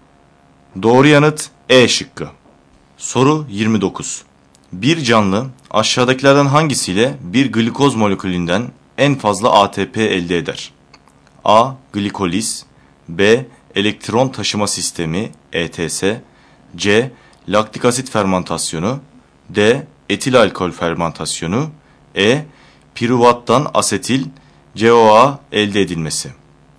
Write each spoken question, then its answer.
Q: Bir canlı aşağıdakilerden hangisiyle bir glikoz molekülünden en fazla ATP elde eder?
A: Doğru yanıt B şıkkı.